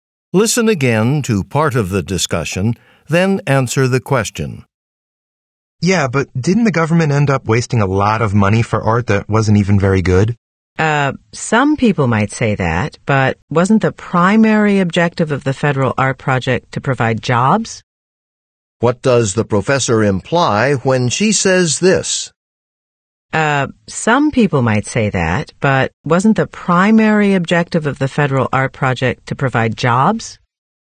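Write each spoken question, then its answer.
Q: What does the professor imply when she says this?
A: The art's quality mattered less, since the project's main goal was to create jobs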